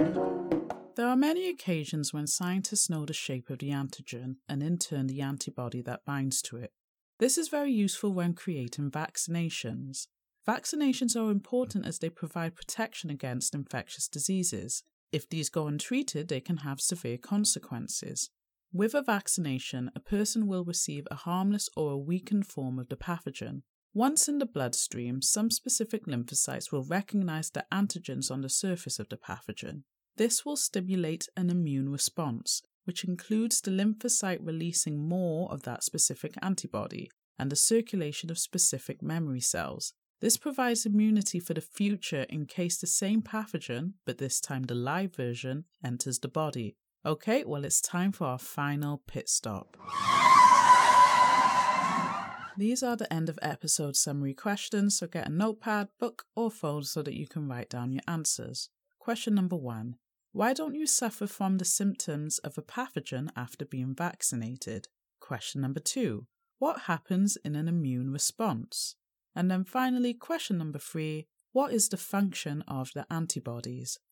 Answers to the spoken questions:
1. because the pathogen in the vaccine is a weakened or harmless form.
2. the lymphocyte cells will produce the complementary antibody in excess, more memory cells will be produced and are circulated in the bloodstream.
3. they attach to the pathogen by binding with the antigens and flags up the pathogen as a foreign body, so it can be destroyed by a series of processes, such as phagocytosis.